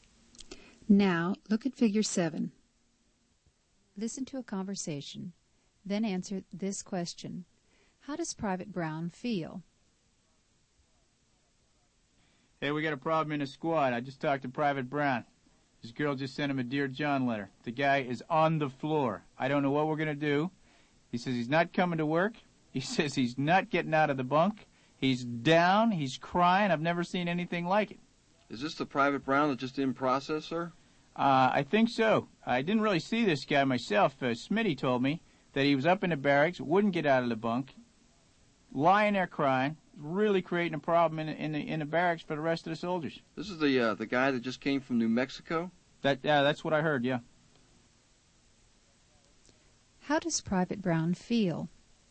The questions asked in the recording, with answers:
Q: How does Private Brown feel?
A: He's sad and depressed.